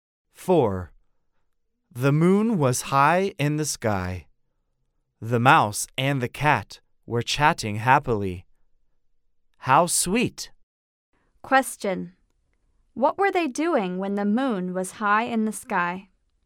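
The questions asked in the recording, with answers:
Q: What were they doing when the moon was high in the sky?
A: They were chatting happily.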